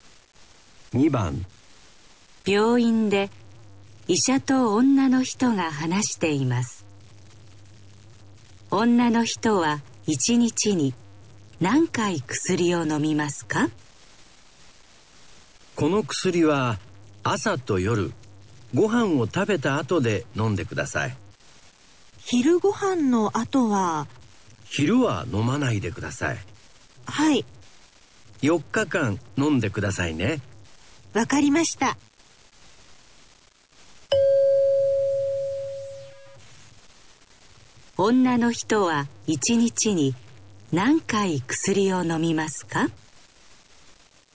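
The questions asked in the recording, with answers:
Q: 女の人は一日に何回薬を飲みますか?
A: 2回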